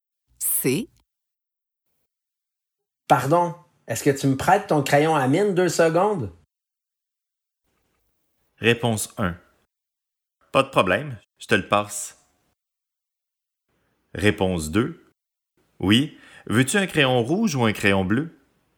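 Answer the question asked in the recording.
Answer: 1: Pas de problème, je te le passe.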